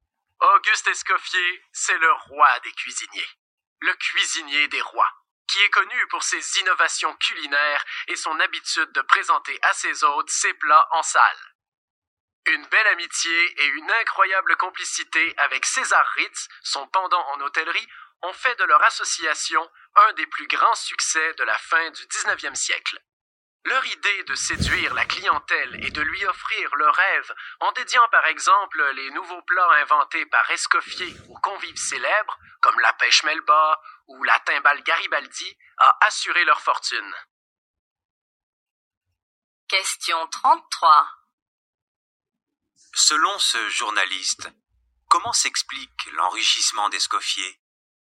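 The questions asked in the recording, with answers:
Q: Selon ce journaliste, comment s'explique l'enrichissement d'Escoffier?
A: En séduisant la clientèle, par exemple en dédiant ses plats à des clients célèbres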